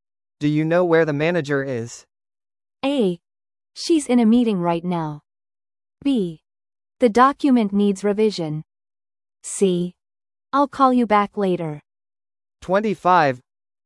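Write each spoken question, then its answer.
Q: Do you know where the manager is?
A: A: She's in a meeting right now.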